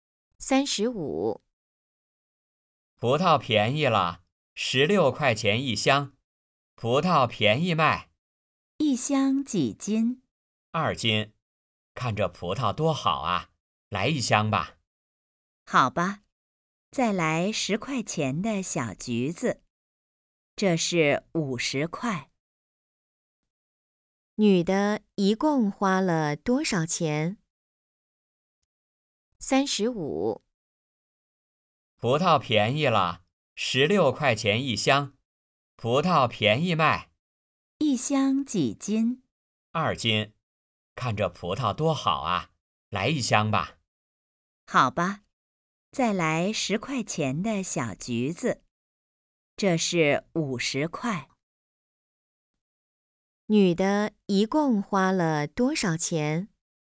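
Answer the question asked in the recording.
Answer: 26块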